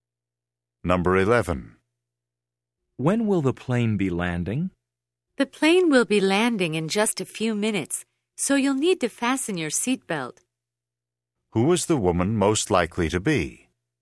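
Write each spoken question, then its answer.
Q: Who is the woman most likely to be?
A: A flight attendant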